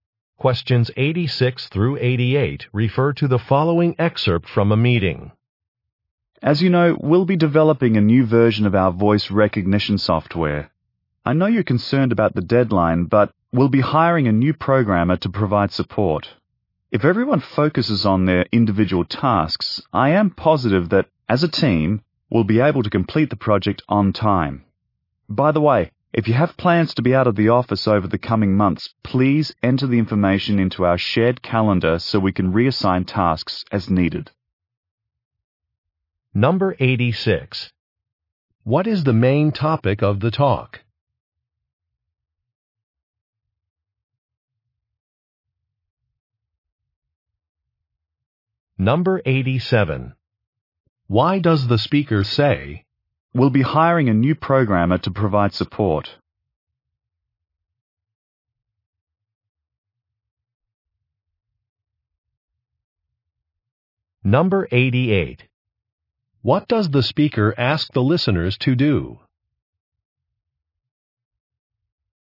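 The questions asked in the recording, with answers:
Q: What is the main topic of the talk?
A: Developing new voice recognition software

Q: What does the speaker ask the listeners to do?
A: Enter out-of-office plans in the shared calendar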